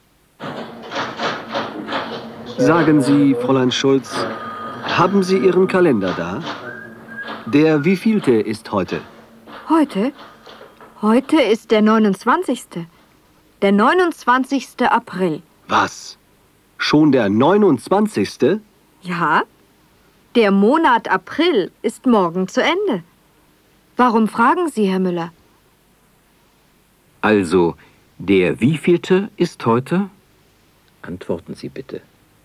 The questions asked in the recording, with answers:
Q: Also, der wievielte ist heute?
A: Heute ist der 29. April.